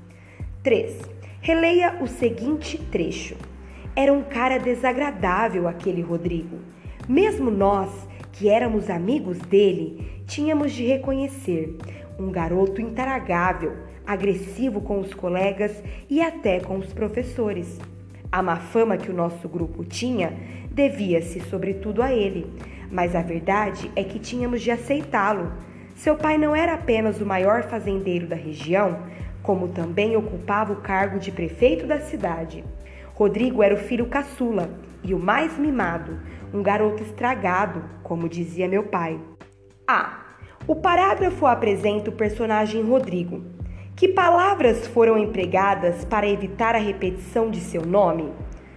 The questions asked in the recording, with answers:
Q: o parágrafo apresenta o personagem Rodrigo, que palavras foram empregadas para evitar a repetição de seu nome?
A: Dele, ele, lo, seu pai, né?